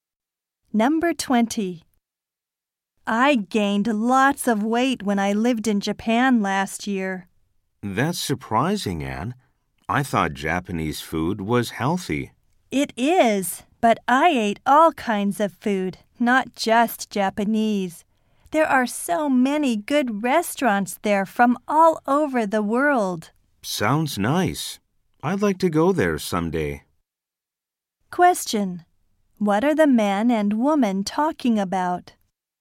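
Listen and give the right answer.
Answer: The woman's time in Japan, where she gained weight.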